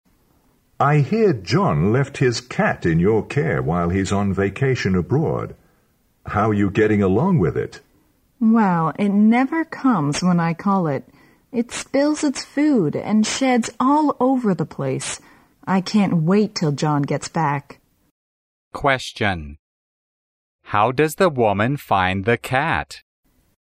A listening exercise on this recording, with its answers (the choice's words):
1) How does the woman find the cat?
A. A financial burden.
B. A good companion.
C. A real nuisance.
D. A well-trained pet.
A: A real nuisance.

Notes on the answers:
考点:推理题。女士一直在抱怨那只猫,说它把食物和猫毛弄得到处都是。可见她非常讨厌它,故选C项。从对话中并不能看出这只猫给女士造成经济负担,所以排除A项。

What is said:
M: I hear John left his cat in your care while he's on vacation abroad. How are you getting along with it?
W: Well, it never comes when I call it. It spills its food and sheds all over the place. I can't wait till John gets back.
Question: How does the woman find the cat?